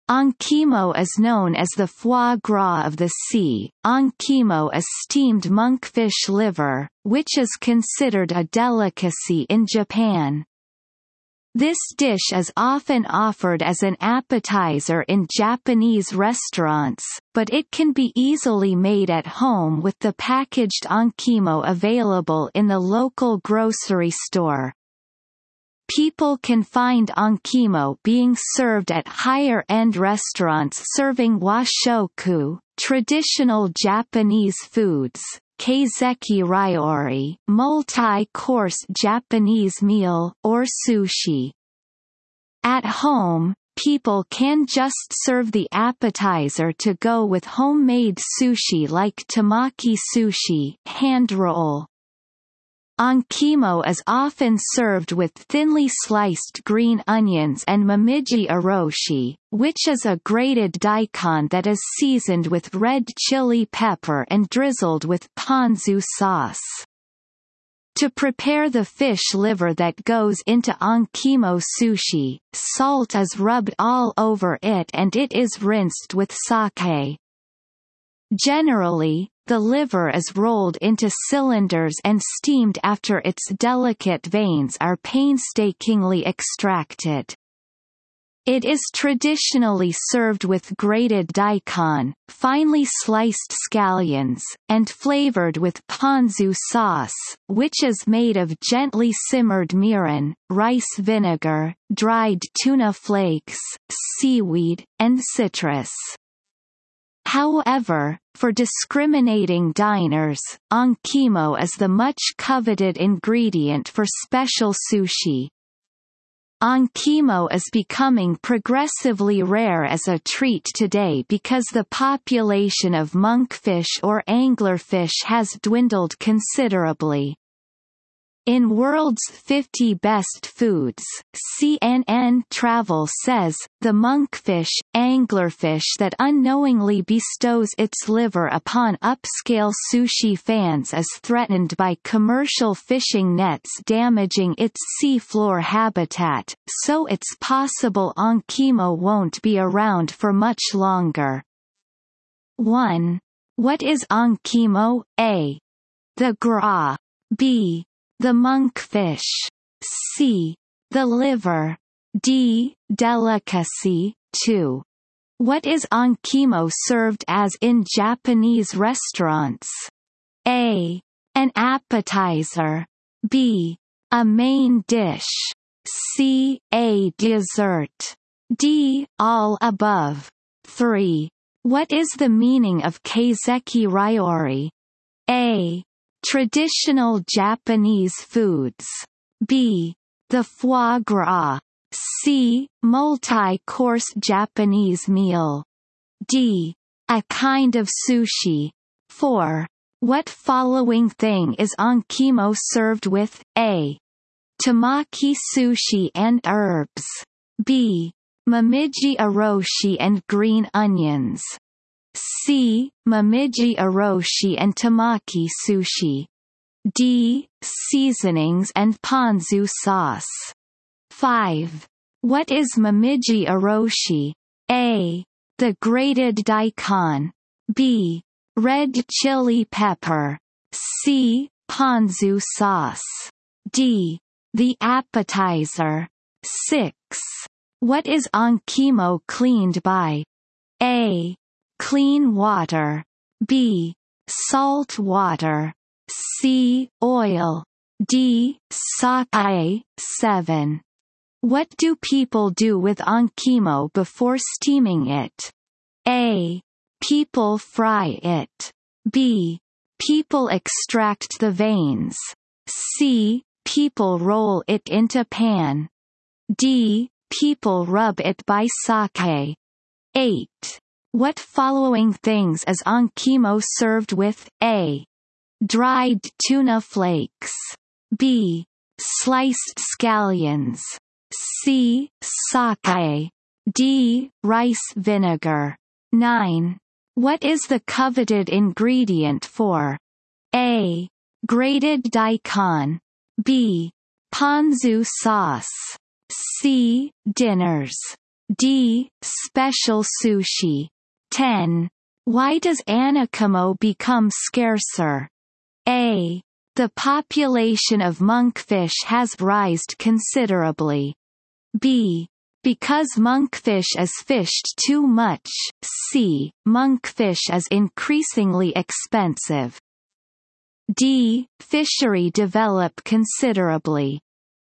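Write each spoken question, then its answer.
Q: What is onkimo served as in Japanese restaurants?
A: A: An appetizer.

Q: What is the meaning of kaiseki ryori?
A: C: Multi-course Japanese meal.

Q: What following thing is onkimo served with?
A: B: Momiji oroshi and green onions.

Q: What is momiji oroshi?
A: A: The grated daikon.

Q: What is onkimo cleaned by?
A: D: Sake.

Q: What do people do with onkimo before steaming it?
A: B: People extract the veins.

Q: What following things is onkimo served with?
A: B: Sliced scallions.

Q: What is the coveted ingredient for?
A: D: Special sushi.

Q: Why does anakimo become scarcer?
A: B: Because monkfish is fished too much.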